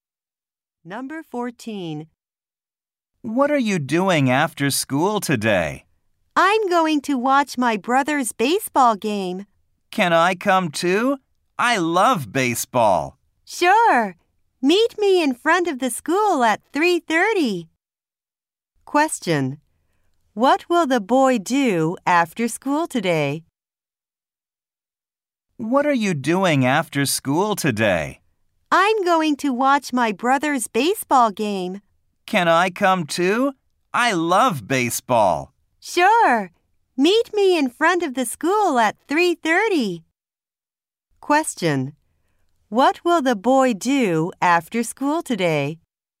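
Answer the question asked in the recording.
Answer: Watch a baseball game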